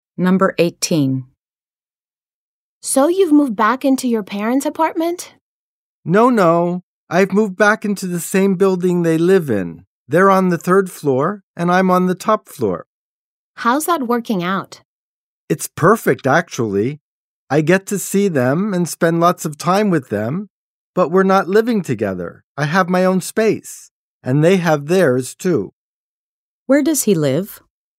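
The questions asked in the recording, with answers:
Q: Where does he live?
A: In the same building as his parents, on the top floor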